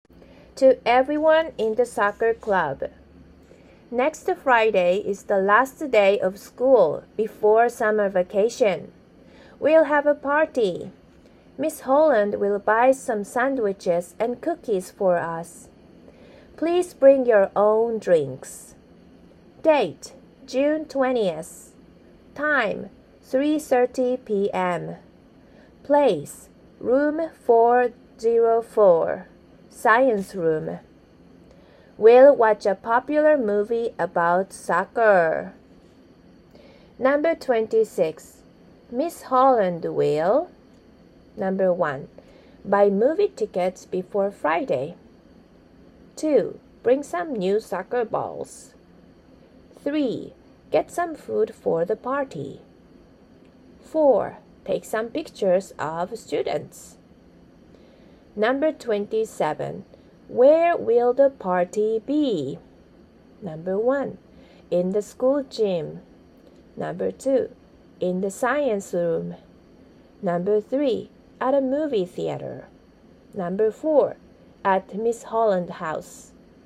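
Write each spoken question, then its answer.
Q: Miss Holland will.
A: 3: Get some food for the party.

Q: Where will the party be?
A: 2: In the science room.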